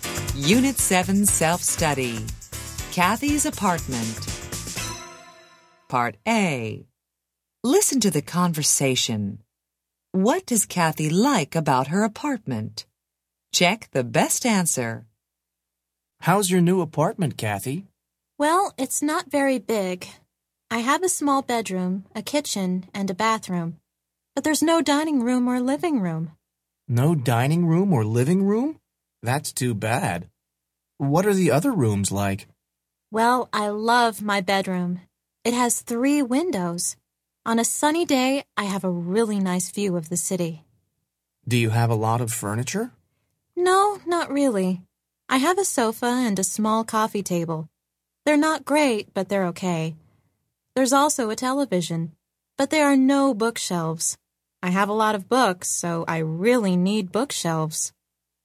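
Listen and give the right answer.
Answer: Her bedroom, which has three windows and a nice view of the city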